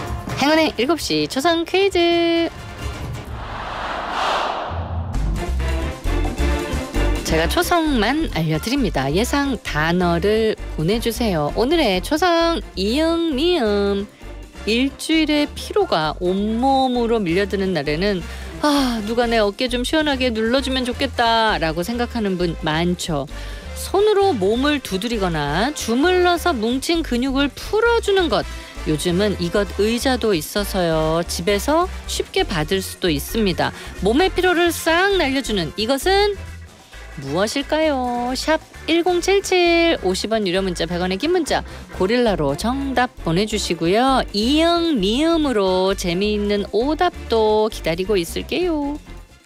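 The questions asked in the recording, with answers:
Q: 몸의 피로를 싹 날려주는 이것은 무엇일까요?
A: 안마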